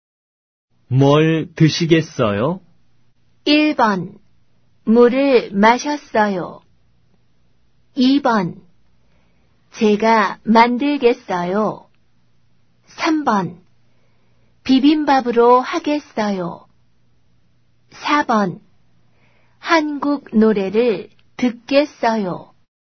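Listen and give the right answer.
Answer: 3: 비빔밥으로 하겠어요.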